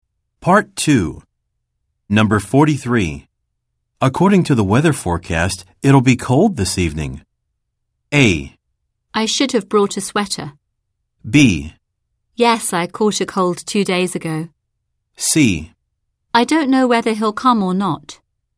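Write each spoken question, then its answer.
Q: According to the weather forecast, it'll be cold this evening.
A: A: I should have brought a sweater.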